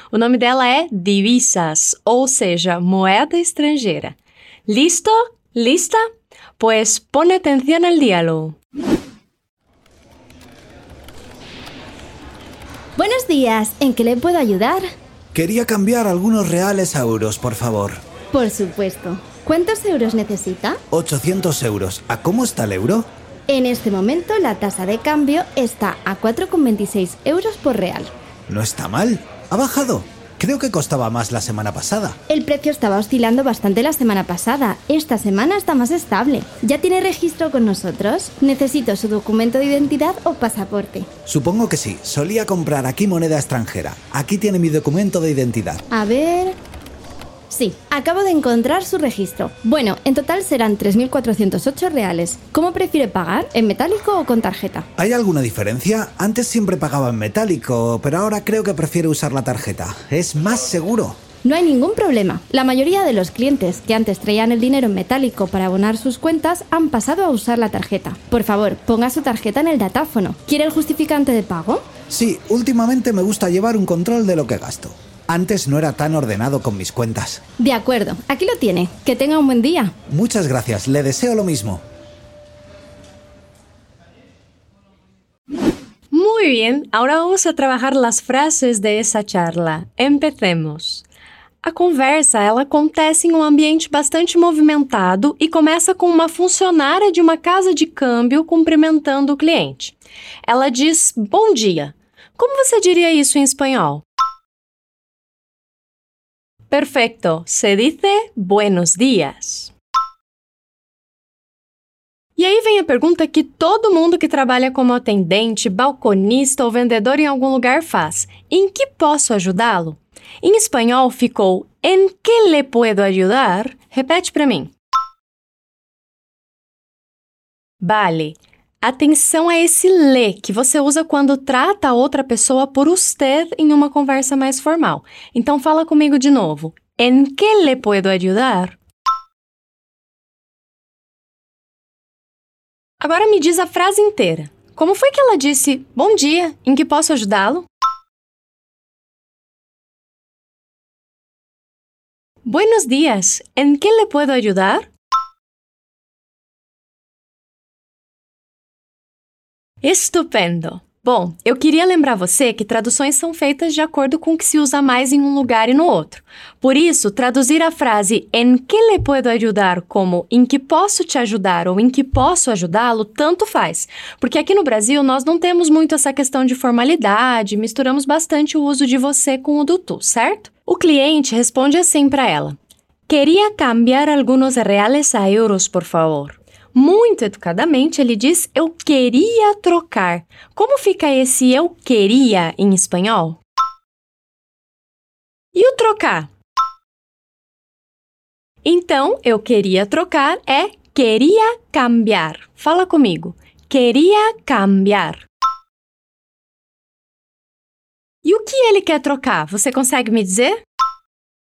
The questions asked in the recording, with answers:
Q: E o que ele quer trocar? Você consegue me dizer?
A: Isso mesmo, ele quer trocar alguns reais por euros